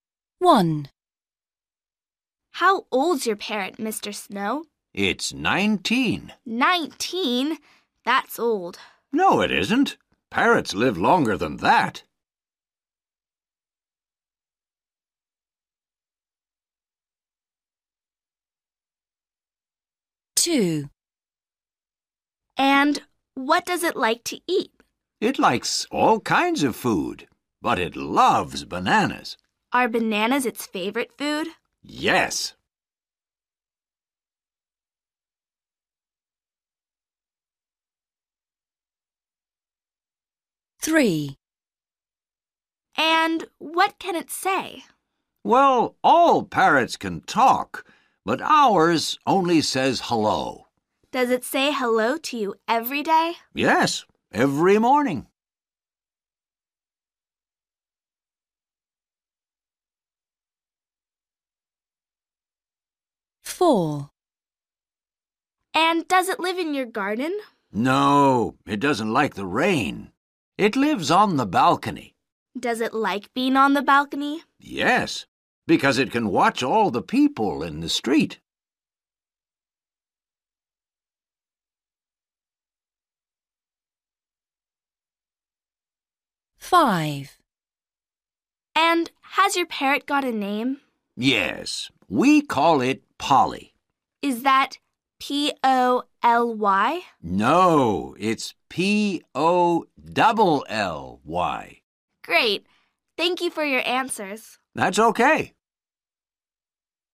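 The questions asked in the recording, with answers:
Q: How old's your parrot, Mr.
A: 19

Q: And what does it like to eat?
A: bananas

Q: And what can it say?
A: hello

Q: And does it live in your garden?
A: No, on the balcony

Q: And has your parrot got a name?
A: Polly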